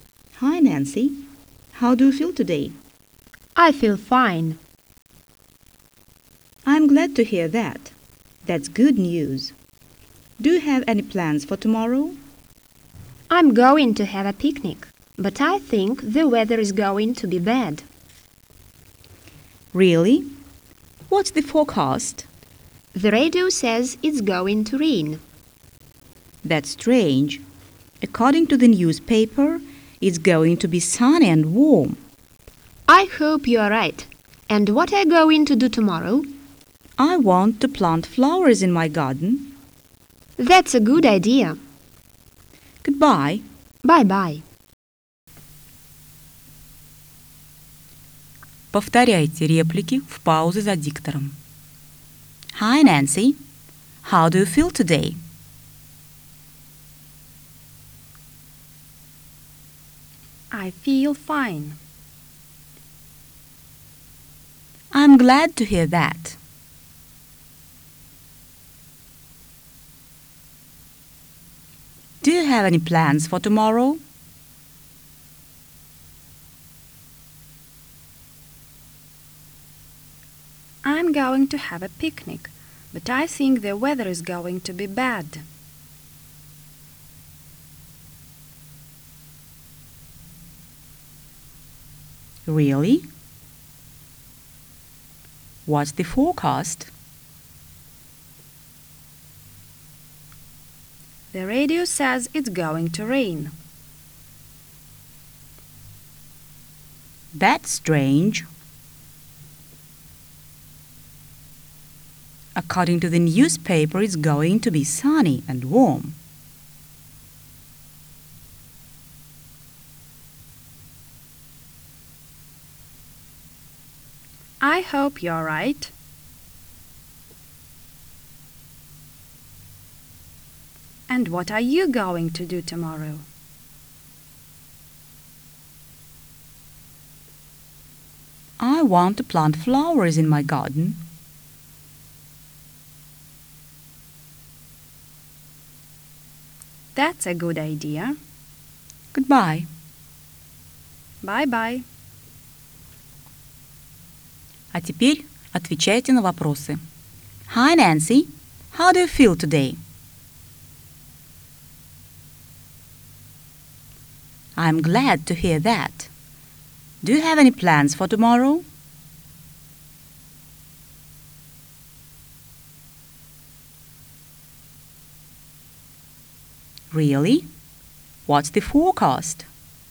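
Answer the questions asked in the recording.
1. I feel fine.
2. I'm going to have a picnic, but I think the weather is going to be bad.
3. The radio says it's going to rain.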